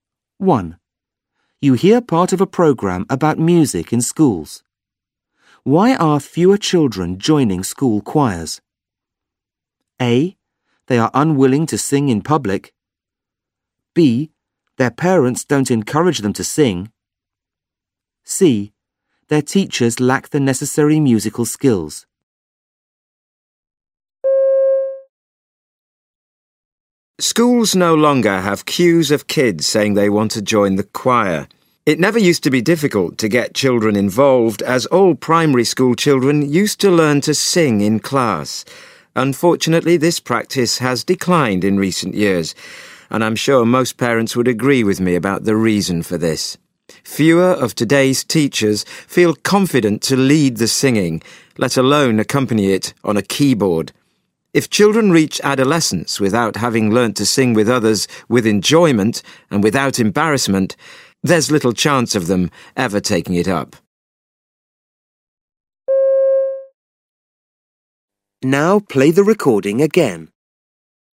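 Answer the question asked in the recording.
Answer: C: Their teachers lack the necessary musical skills.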